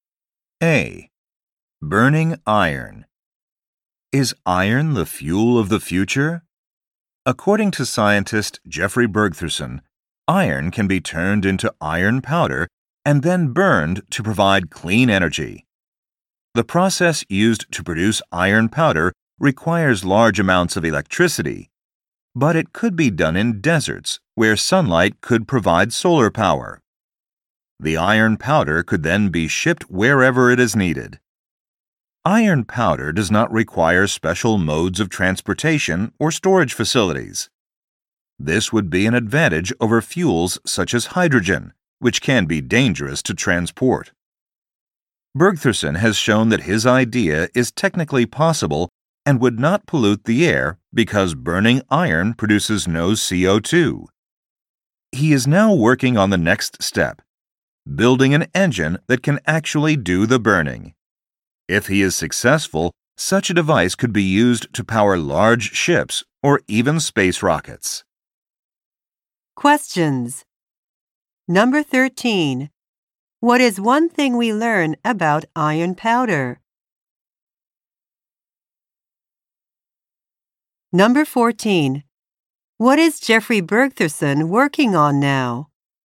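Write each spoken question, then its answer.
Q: What is Jeffrey Bergtherson working on now?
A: Building an engine that can burn iron powder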